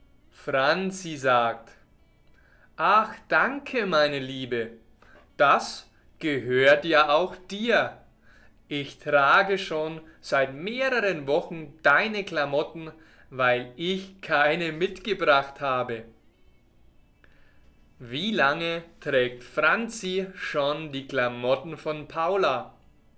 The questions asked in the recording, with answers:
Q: Wie lange trägt Franzi schon die Klamotten von Paula?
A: Seit einigen Wochen.